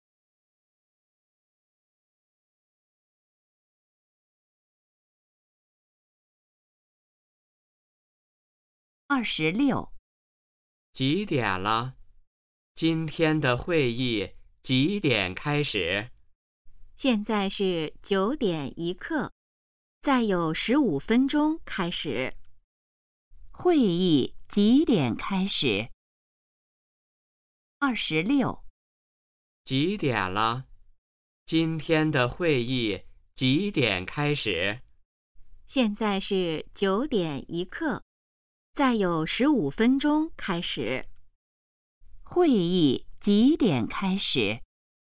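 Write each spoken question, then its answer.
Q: 会议几点开始?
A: 9:16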